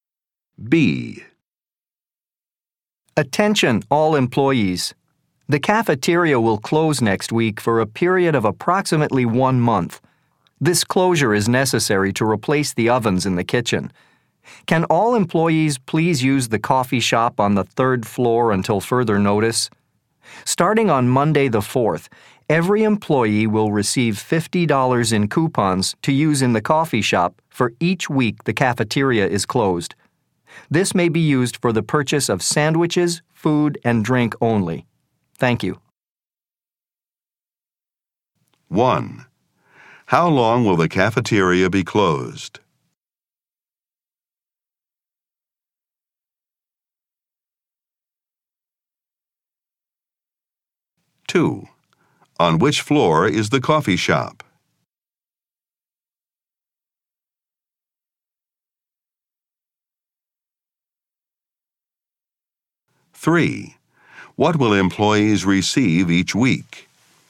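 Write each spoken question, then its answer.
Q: How long will the cafeteria be closed?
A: About 1 month

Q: On which floor is the coffee shop?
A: The 3rd floor

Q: What will employees receive each week?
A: $50 in coupons for the coffee shop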